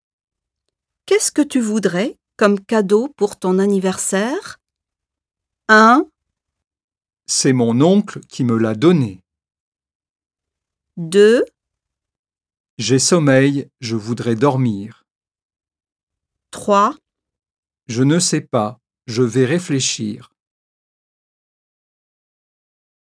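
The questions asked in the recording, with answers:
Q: Qu'est-ce que tu voudrais comme cadeau pour ton anniversaire?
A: 3: Je ne sais pas, je vais réfléchir.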